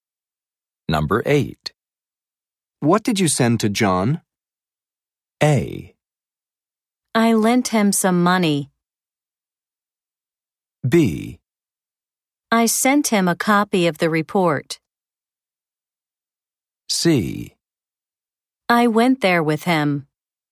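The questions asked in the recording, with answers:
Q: What did you send to John?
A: B: I sent him a copy of the report.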